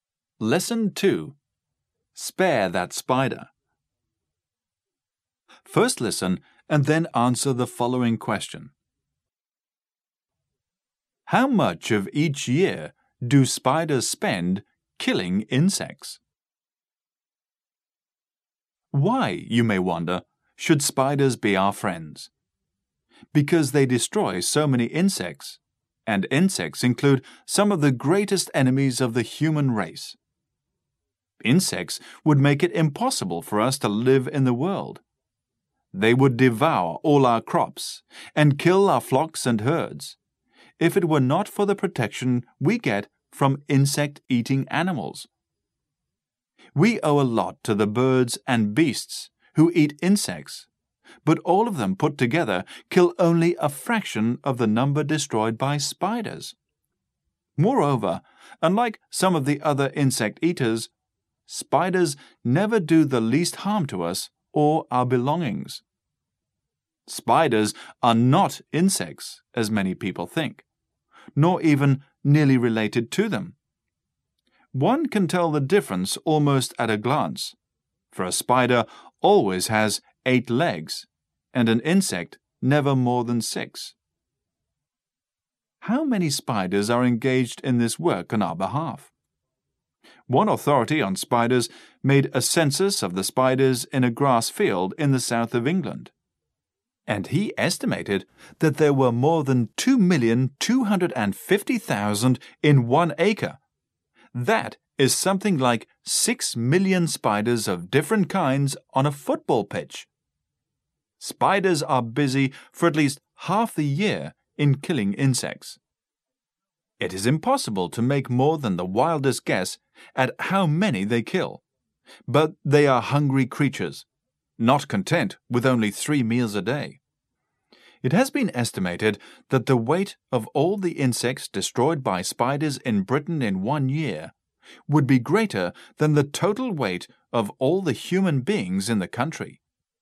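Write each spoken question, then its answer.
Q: How much of each year do spiders spend killing insects?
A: At least half the year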